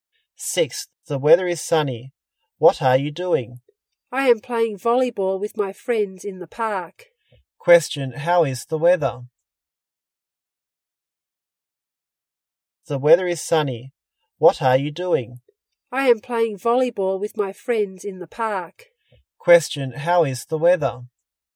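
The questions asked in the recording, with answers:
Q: Question: How is the weather?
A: Sunny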